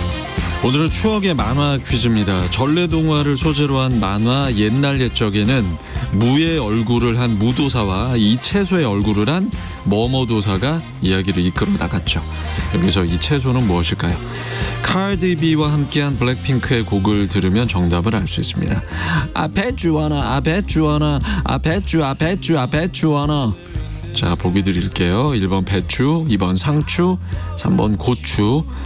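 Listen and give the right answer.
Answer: 1: 배추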